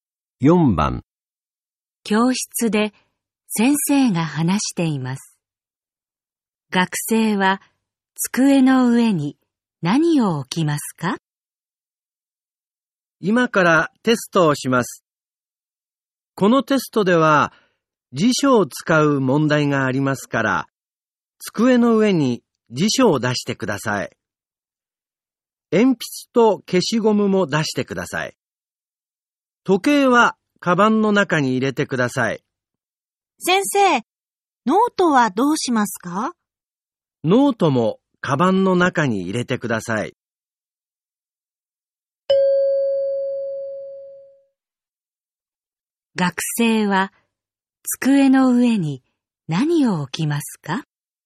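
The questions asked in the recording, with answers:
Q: 学生は机の上に何を置きますか?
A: 辞書と鉛筆と消しゴム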